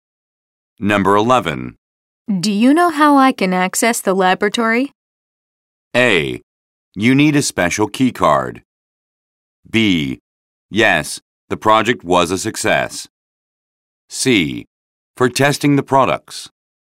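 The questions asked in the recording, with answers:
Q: Do you know how I can access the laboratory?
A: A: You need a special key card.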